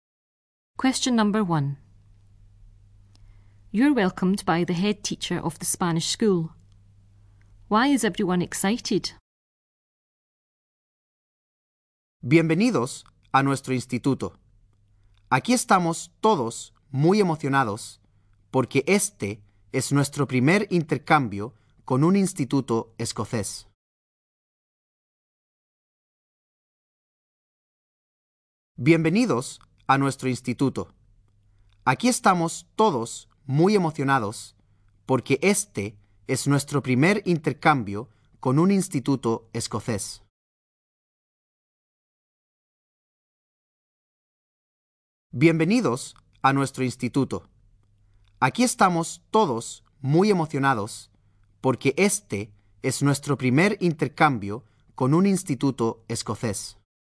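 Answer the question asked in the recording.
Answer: It is their first exchange with a Scottish school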